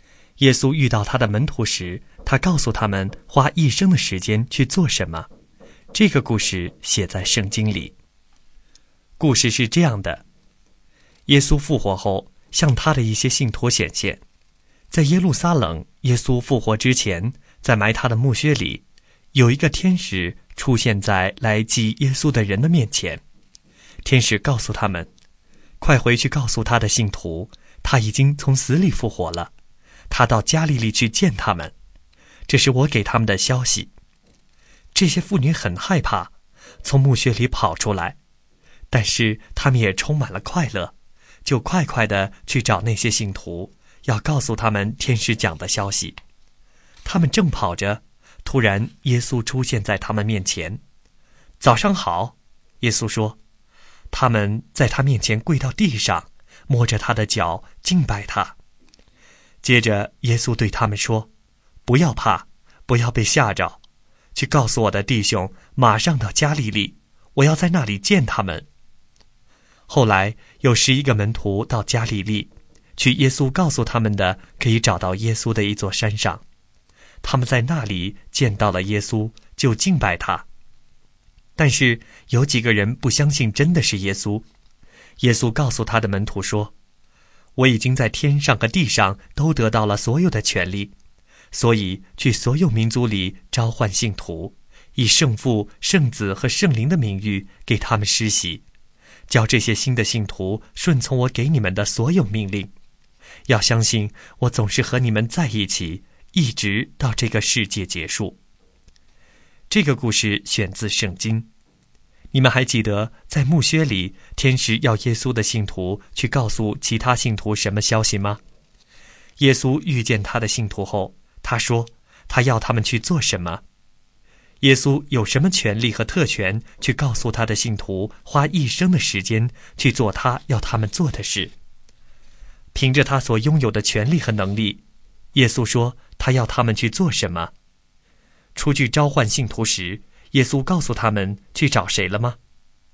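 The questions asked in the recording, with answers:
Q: 你们还记得在墓穴里,天使要耶稣的信徒去告诉其他信徒什么消息吗?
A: 耶稣已经从死里复活了,他到加利利去见他们

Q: 耶稣遇见他的信徒后,他说他要他们去做什么?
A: 去所有民族里召唤信徒,给他们施洗,教他们顺从耶稣的命令

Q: 耶稣有什么权利和特权去告诉他的信徒花一生的时间去做他要他们做的事?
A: 他已经在天上和地上都得到了所有的权利

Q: 出去召唤信徒时,耶稣告诉他们去找谁了吗?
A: 所有民族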